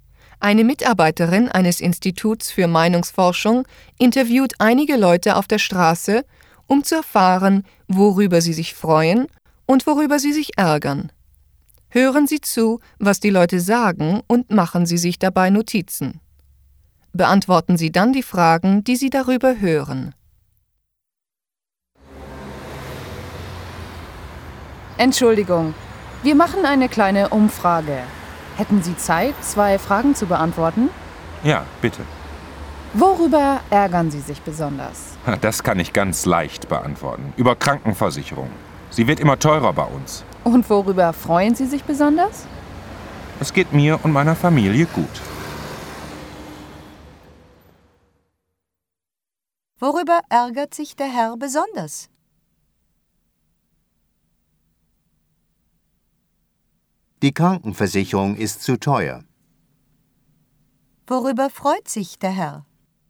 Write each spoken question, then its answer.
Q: Worüber freut sich der Herr?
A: Es geht ihm und seiner Familie gut.